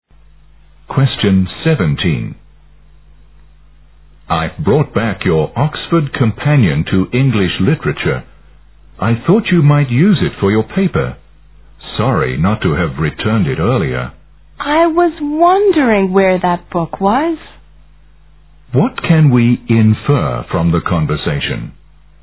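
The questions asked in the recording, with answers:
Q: What can we infer from the conversation?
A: The speaker had borrowed the man's book and returned it late; he had been wondering where it was.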